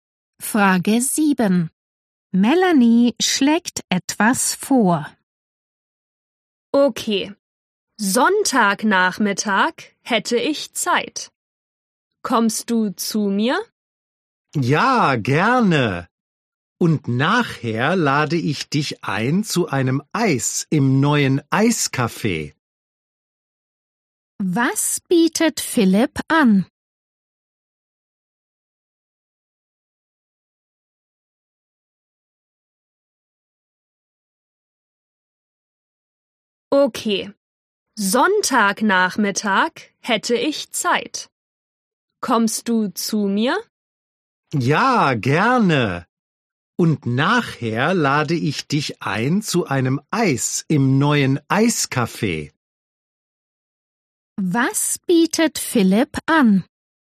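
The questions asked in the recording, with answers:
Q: Was bietet Philipp an?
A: Ein Eis im neuen Eiscafé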